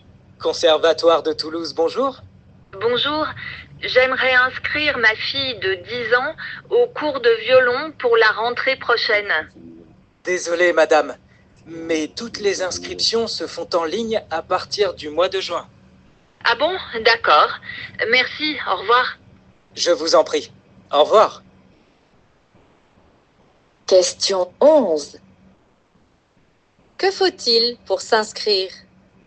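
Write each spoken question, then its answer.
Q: Que faut-il pour s'inscrire?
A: S'inscrire en ligne à partir du mois de juin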